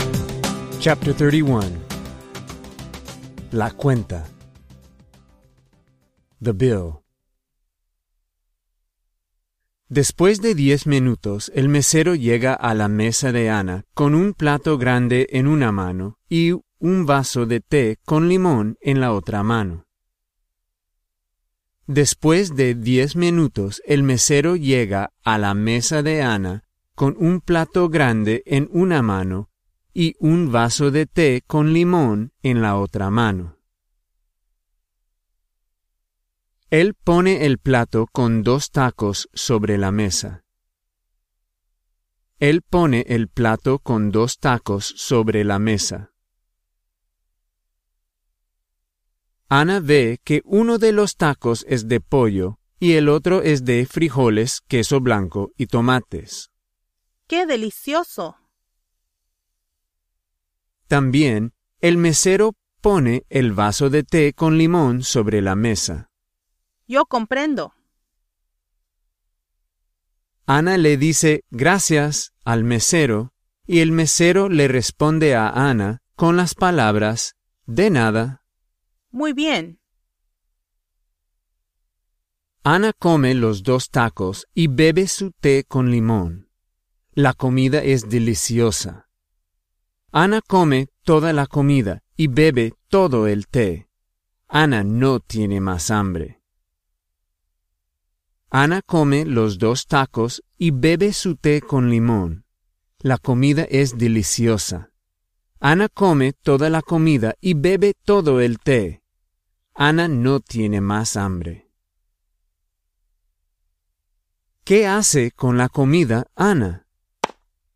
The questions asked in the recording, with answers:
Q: ¿Qué hace con la comida, Ana?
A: Ana la come.